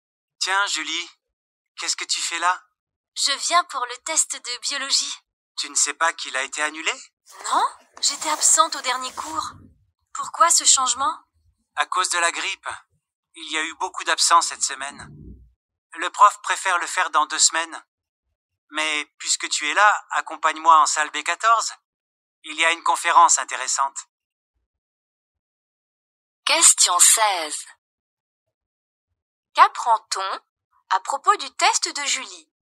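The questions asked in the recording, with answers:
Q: Qu'apprend-on à propos du test de Julie?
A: Il a été annulé et reporté à dans 2 semaines à cause de la grippe.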